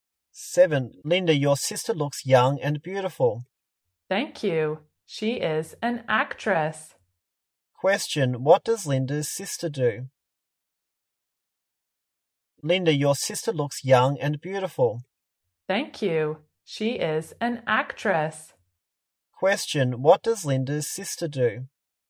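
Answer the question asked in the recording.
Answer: She is an actress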